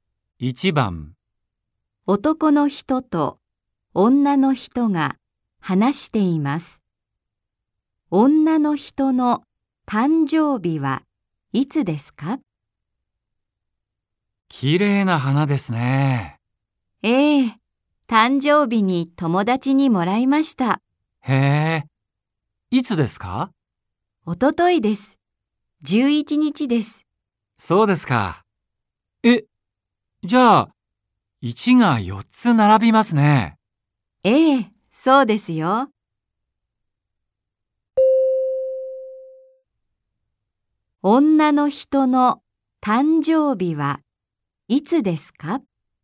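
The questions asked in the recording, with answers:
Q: 女の人の誕生日はいつですか?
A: 11月11日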